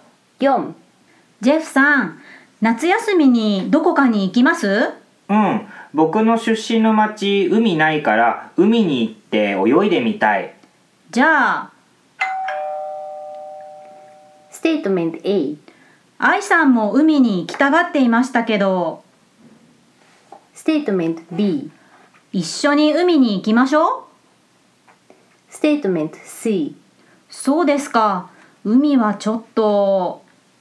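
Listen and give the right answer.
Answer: B: 一緒に海に行きましょう。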